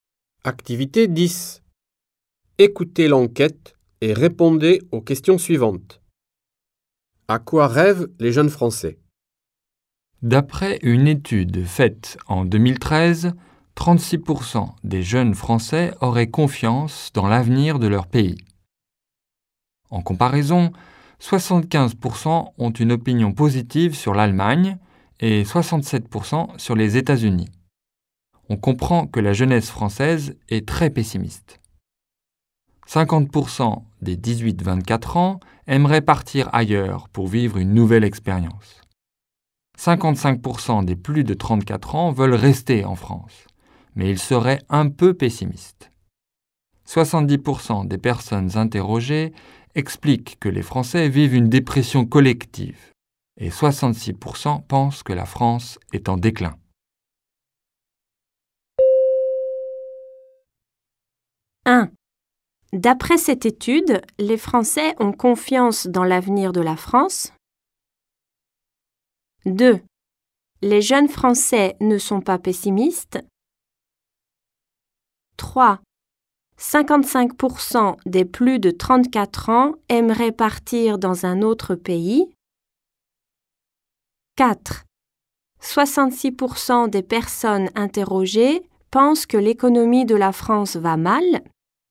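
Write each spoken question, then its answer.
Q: D'après cette étude, les Français ont confiance dans l'avenir de la France.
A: Faux (seulement 36% des jeunes ont confiance)

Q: Les jeunes Français ne sont pas pessimistes.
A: Faux (la jeunesse française est très pessimiste)

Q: 55% des plus de 34 ans aimeraient partir dans un autre pays.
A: Faux (ils veulent rester en France)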